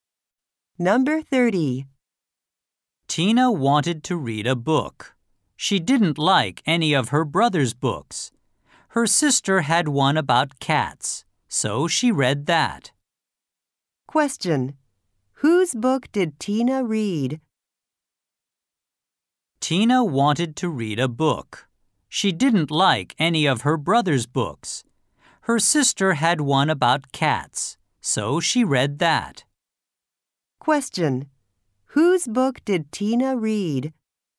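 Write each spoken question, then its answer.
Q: Whose book did Tina read?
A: Her sister's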